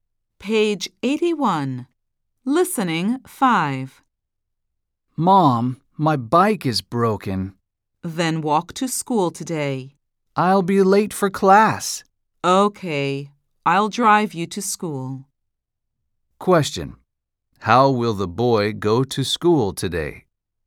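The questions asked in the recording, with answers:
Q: How will the boy go to school today?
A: By car (his mom will drive him)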